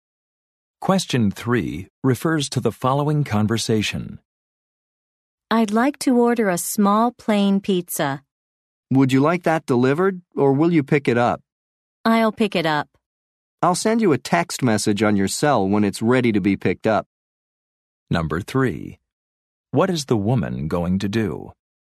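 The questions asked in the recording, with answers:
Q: What is the woman going to do?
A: Pick up the pizza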